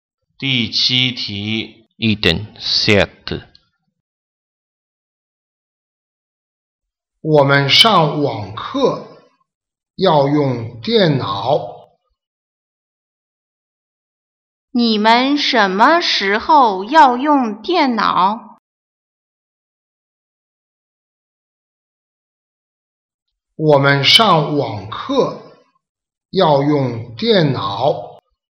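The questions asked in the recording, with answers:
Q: 你们什么时候要用电脑?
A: 上网课的时候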